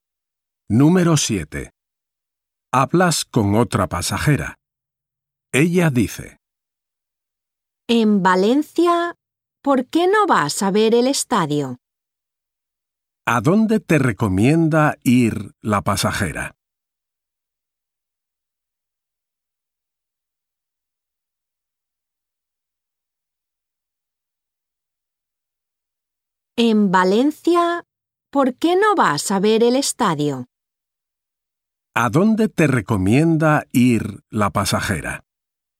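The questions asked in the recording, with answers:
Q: ¿A dónde te recomienda ir la pasajera?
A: Al estadio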